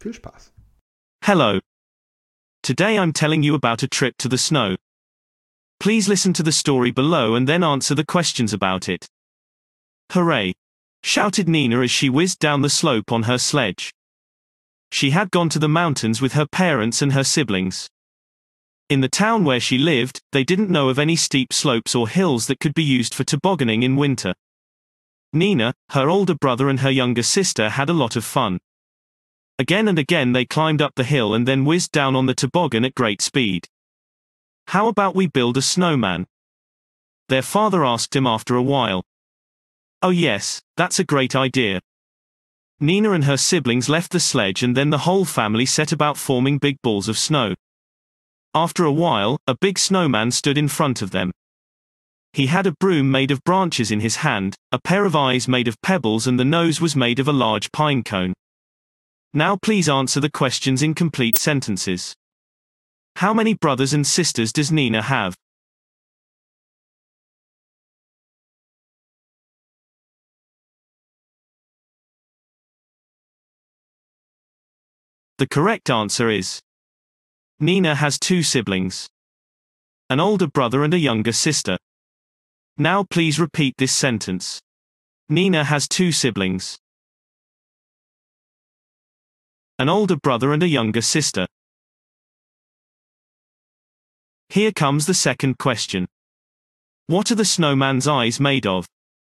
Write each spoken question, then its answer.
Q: How many brothers and sisters does Nina have?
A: The correct answer is Nina has two siblings, an older brother and a younger sister.

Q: What are the snowman's eyes made of?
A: The correct answer is the snowman's eyes are made of pebbles.